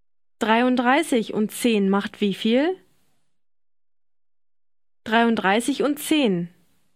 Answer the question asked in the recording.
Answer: 43.